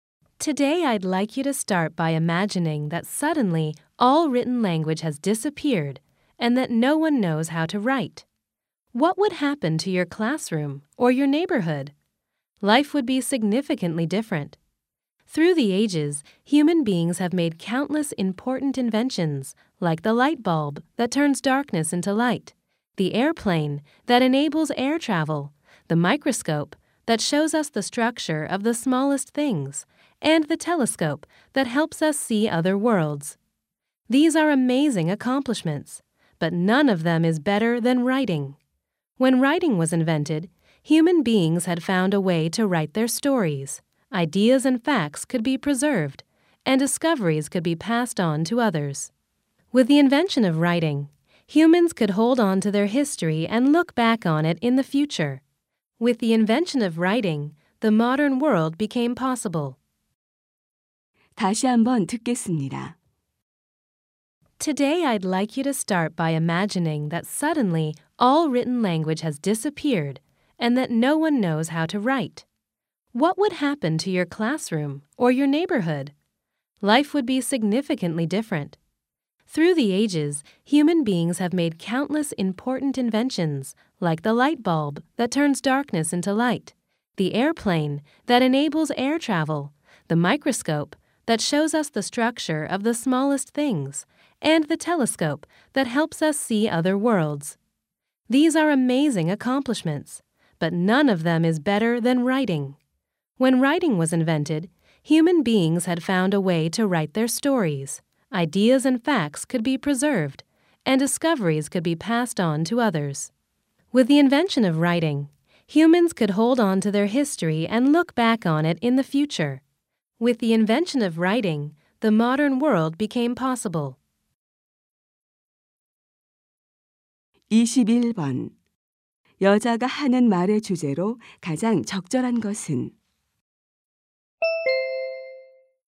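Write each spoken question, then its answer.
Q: 여자가 하는 말의 주제로 가장 적절한 것은?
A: 인류 최고의 발명품인 문자(글쓰기)의 중요성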